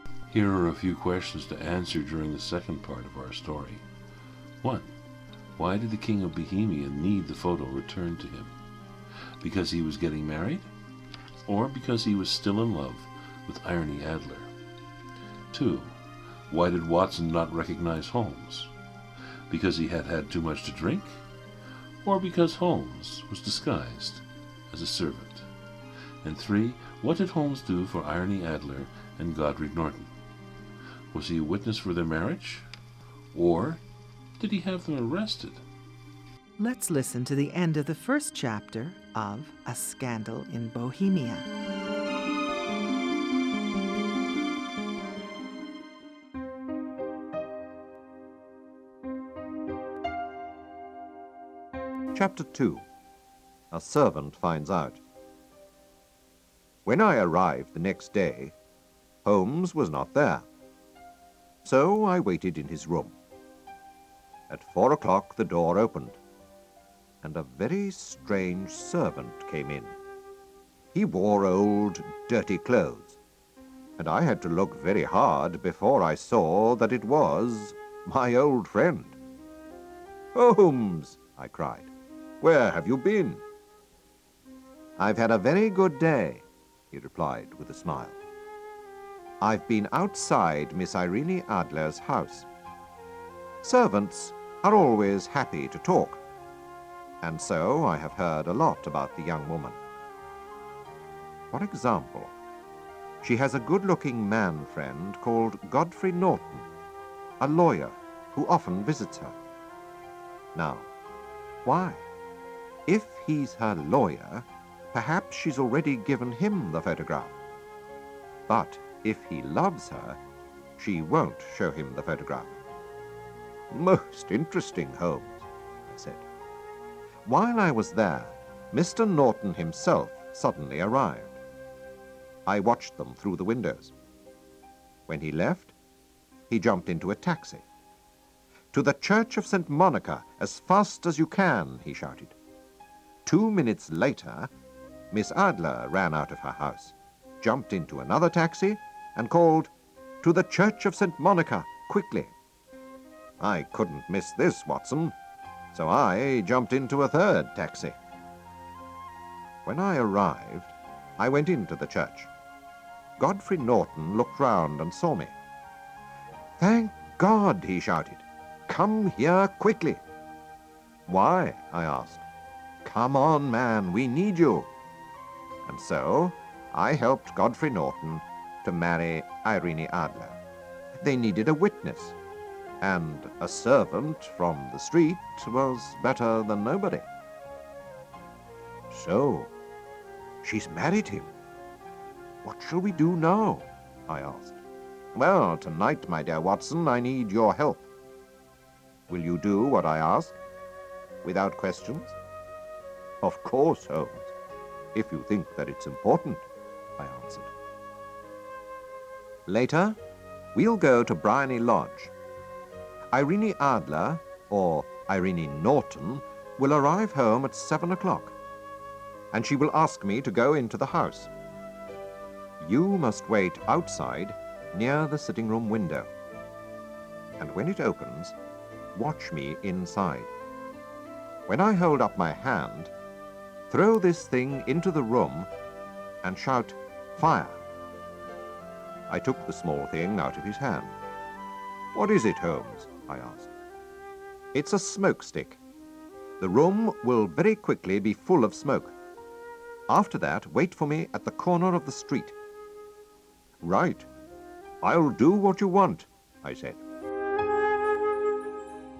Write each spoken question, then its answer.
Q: Why did Watson not recognize Holmes?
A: Watson realized was Sherlock Holmes in disguise.

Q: What did Holmes do for Irene Adler and Godric Norton?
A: So Sherlock Holmes was the witness at their marriage.